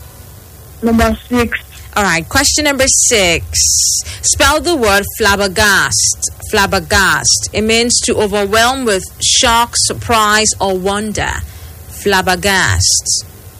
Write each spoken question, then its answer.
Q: Spell the word flabbergast.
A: F-L-A-B-B-E-R-G-A-S-T. Flabbergast.